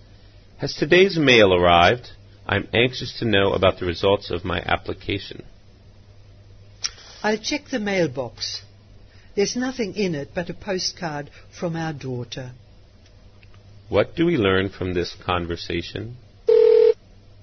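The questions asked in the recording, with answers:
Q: What do we learn from this conversation?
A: The application results haven't arrived yet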